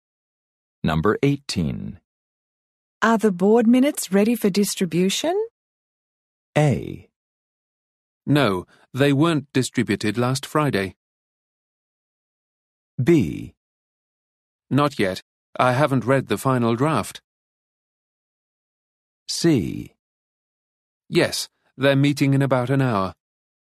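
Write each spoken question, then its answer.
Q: Are the board minutes ready for distribution?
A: B: Not yet. I haven't read the final draft.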